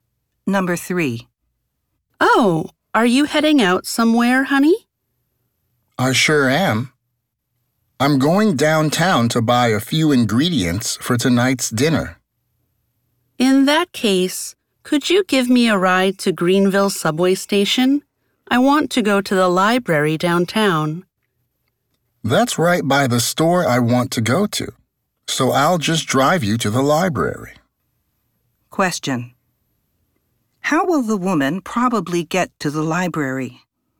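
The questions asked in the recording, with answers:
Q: how will the woman probably get to the library?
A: The man will drive her there by car.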